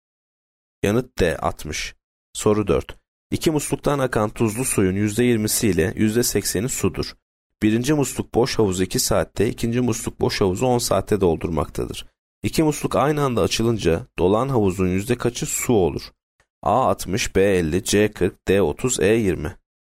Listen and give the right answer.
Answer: Yanıt D 30.